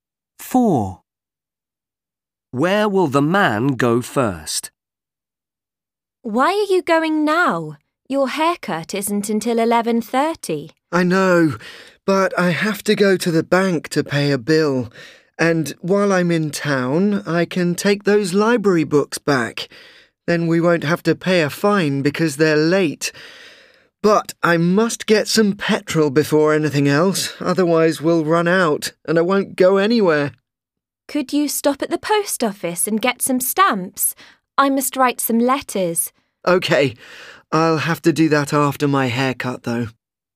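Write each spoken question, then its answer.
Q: Where will the man go first?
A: To get petrol (petrol station)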